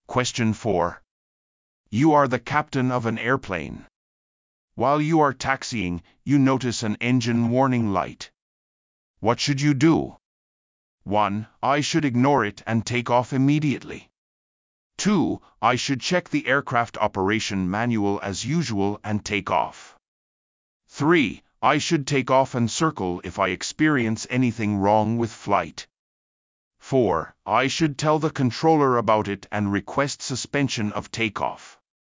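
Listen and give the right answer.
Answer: 4: I should tell the controller about it and request suspension of takeoff.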